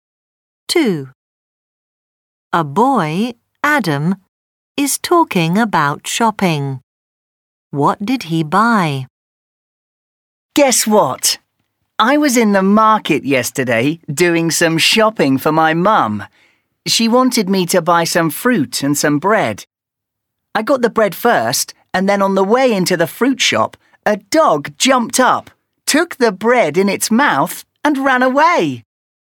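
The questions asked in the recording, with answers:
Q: What did he buy?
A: Bread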